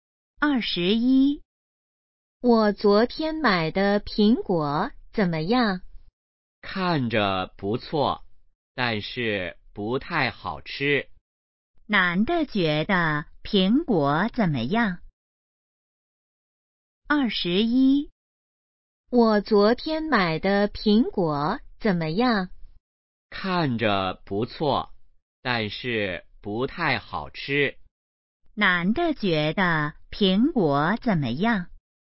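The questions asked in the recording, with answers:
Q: 男的觉得苹果怎么样?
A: 不太好吃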